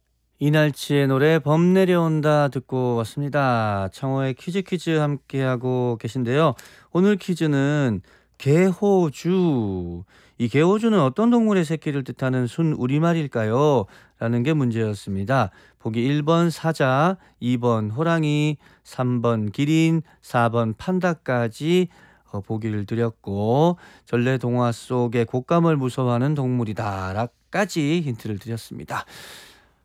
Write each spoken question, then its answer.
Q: 오늘 퀴즈는 개호주. 이 개호주는 어떤 동물의 새끼를 뜻하는 순우리말일까요?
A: 오늘 정답은 2번 호랑이였어요.